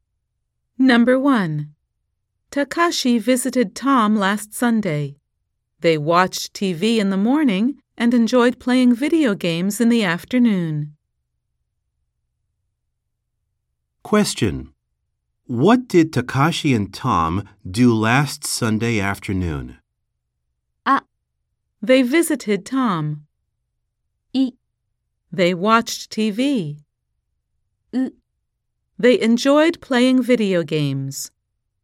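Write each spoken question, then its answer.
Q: What did Takashi and Tom do last Sunday afternoon?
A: ウ: They enjoyed playing video games.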